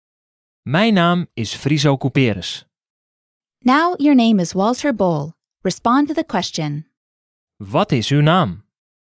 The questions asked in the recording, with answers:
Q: Wat is uw naam?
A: Mijn naam is Walter Bol.